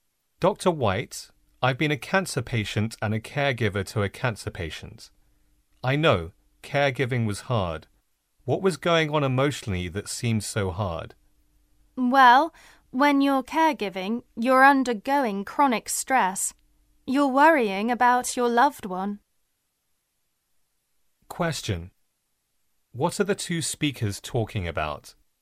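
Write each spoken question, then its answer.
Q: What are the two speakers talking about?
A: The emotional stress of caring for a cancer patient.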